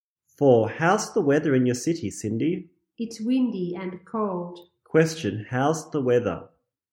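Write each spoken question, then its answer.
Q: How's the weather?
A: It's windy and cold.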